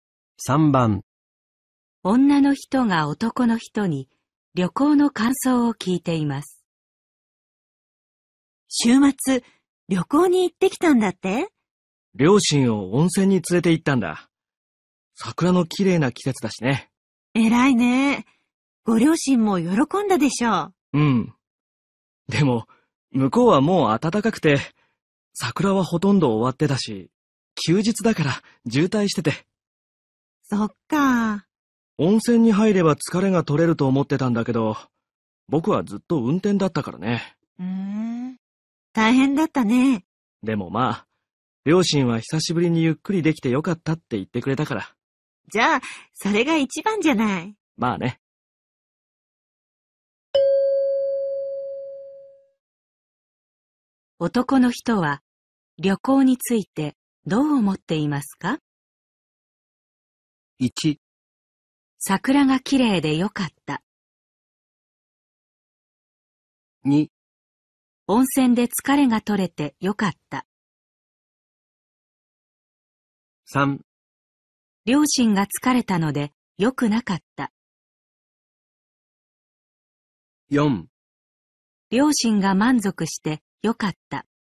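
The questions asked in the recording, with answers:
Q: 男の人は旅行についてどう思っていますか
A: 4: 両親が満足してよかった。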